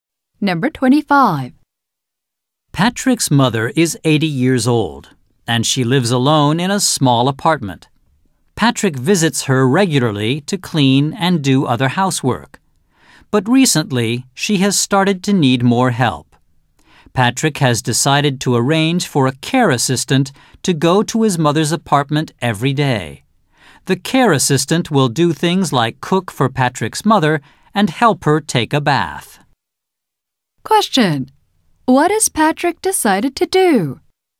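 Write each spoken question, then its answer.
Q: What has Patrick decided to do?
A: Arrange for a care assistant to go to his mother's apartment every day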